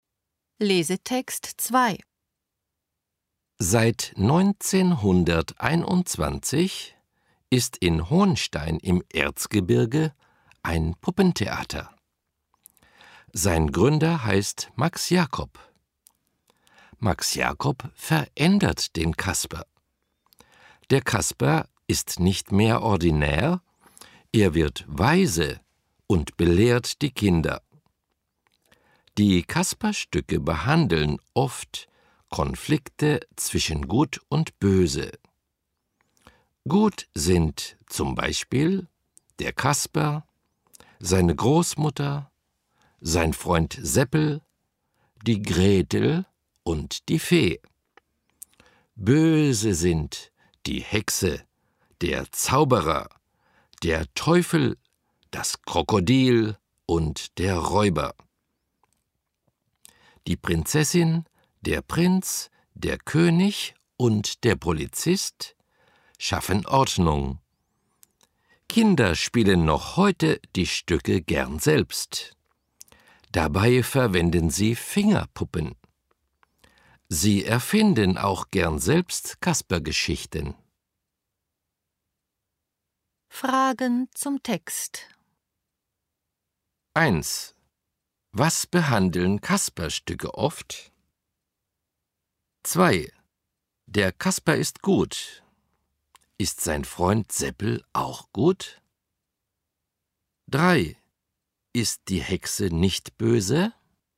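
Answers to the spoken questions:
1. Konflikte zwischen Gut und Böse
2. Ja, Seppel ist auch gut.
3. Doch, die Hexe ist böse.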